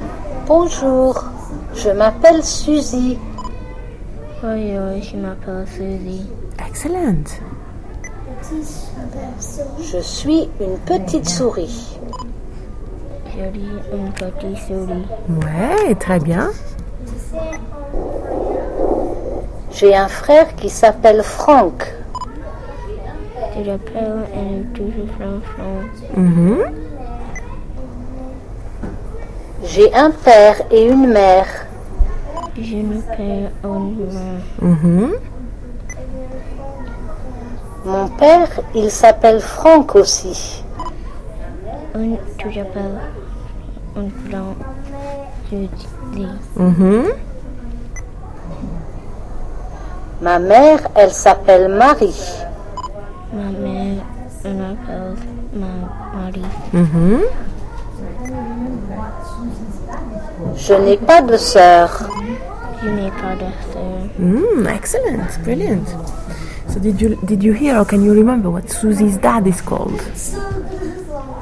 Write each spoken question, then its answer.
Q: So did you hear or can you remember what Susie's dad is called?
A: Frank.